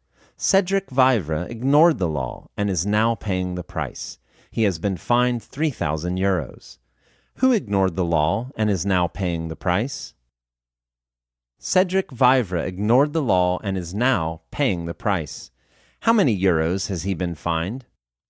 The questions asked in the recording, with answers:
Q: Who ignored the law and is now paying the price?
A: Cedric Vivre ignored the law and is now paying the price.

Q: How many euros has he been fined?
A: He has been fined 3,000 euros.